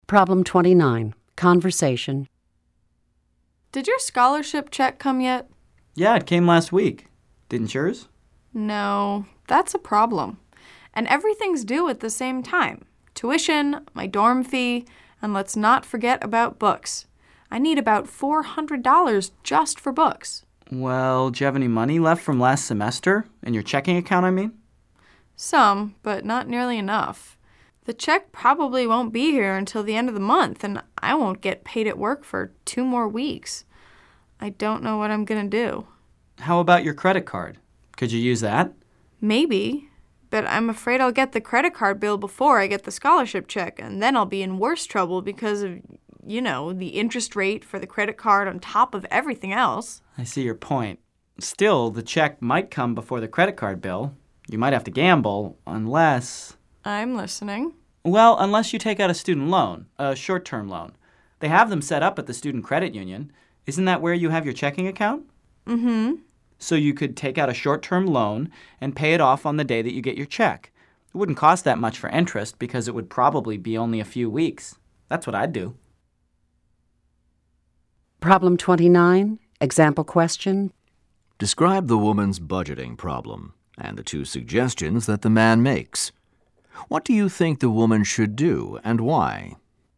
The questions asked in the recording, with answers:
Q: Describe the woman's budgeting problem and the two suggestions that the man makes.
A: The woman doesn't have enough money for her expenses.